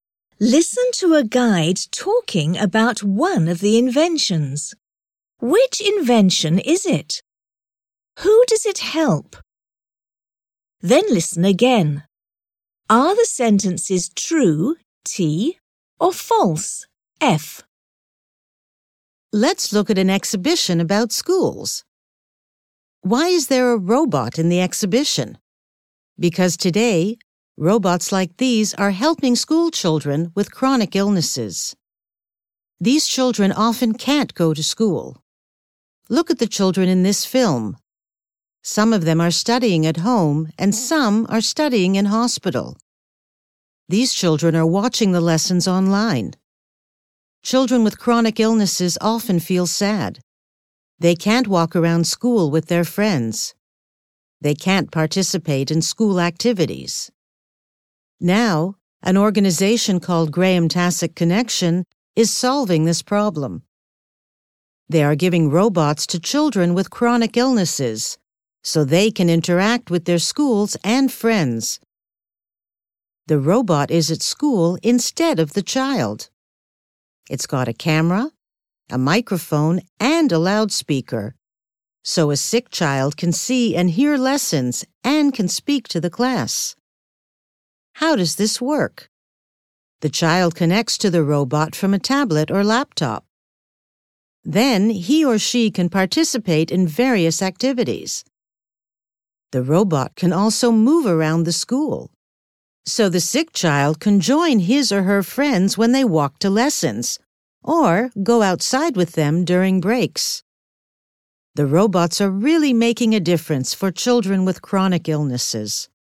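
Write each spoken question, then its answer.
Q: Which invention is it?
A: A robot that goes to school instead of a sick child

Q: Who does it help?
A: School children with chronic illnesses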